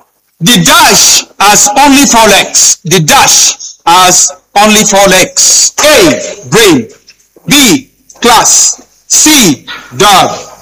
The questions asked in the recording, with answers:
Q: The dash has only 4 legs.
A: C. Dog.